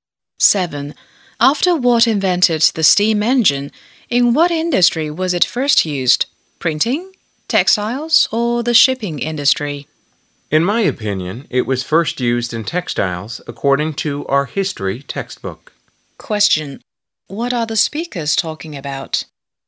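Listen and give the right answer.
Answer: Where the steam engine was first used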